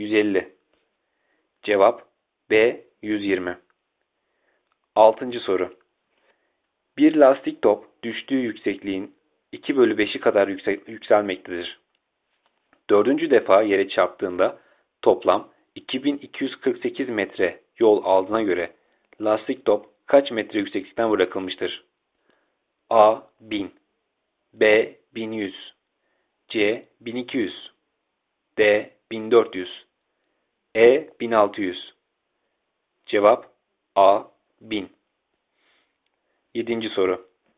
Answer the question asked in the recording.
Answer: Cevap A. 1000